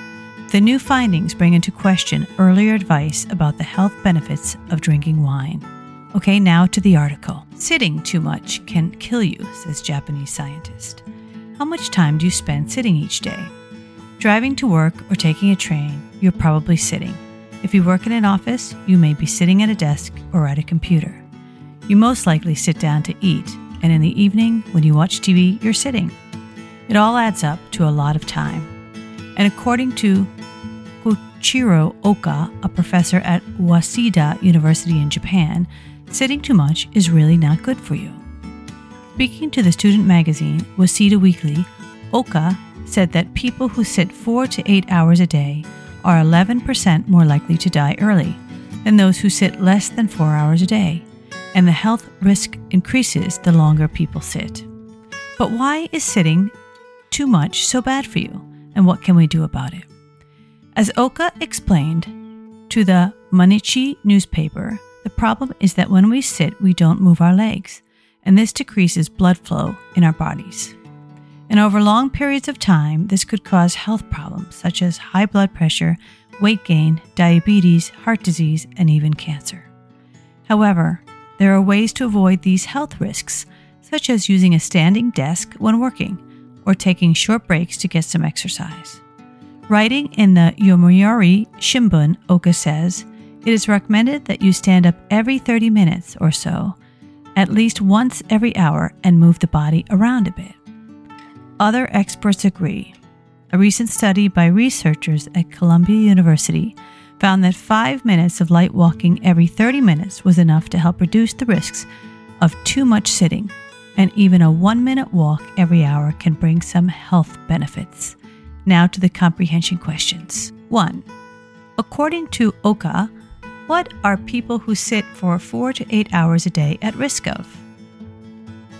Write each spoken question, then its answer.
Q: According to Oka, what are people who sit for 4 to 8 hours a day at risk of?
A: 11% are more likely to die early, and the increased risks for the people who sit longer.